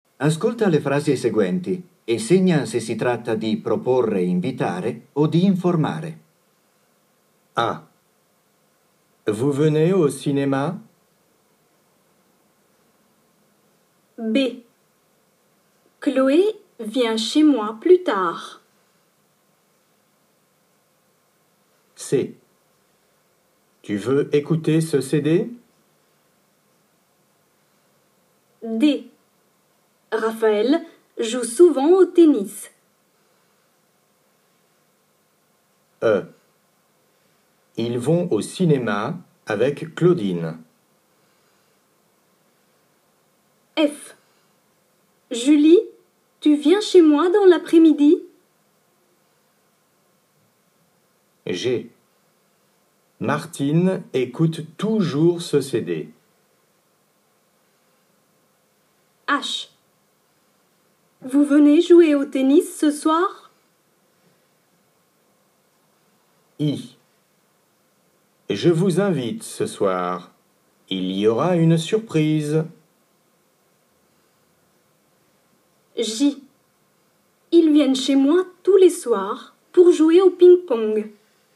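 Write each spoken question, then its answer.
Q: Chloé vient chez moi plus tard.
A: informare

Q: Raphaël joue souvent au tennis.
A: informare

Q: Ils vont au cinéma avec Claudine.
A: informare

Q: Martine écoute toujours ce CD.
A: informare

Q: Je vous invite ce soir.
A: invitare

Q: Ils viennent chez moi tous les soirs pour jouer au ping-pong.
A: informare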